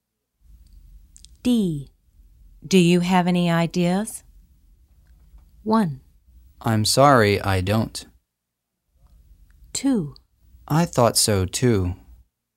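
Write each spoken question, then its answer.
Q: Do you have any ideas?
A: 1: I'm sorry, I don't.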